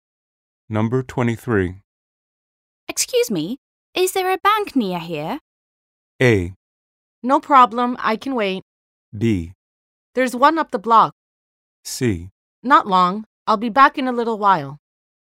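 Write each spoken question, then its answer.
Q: Excuse me, is there a bank near here?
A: B: There's one up the block.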